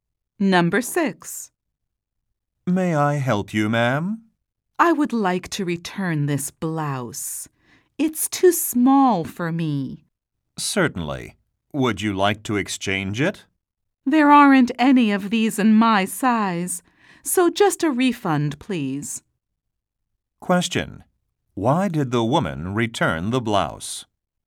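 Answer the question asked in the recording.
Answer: It was too small for her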